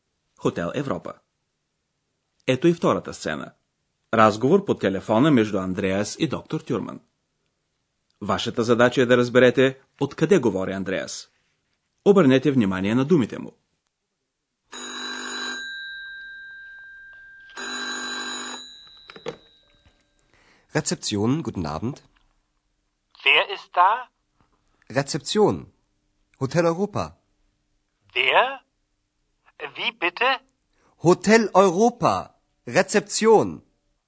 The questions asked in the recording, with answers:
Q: Вашата задача е да разберете откъде говори Андреас.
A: Андрея се обажда от администрацията.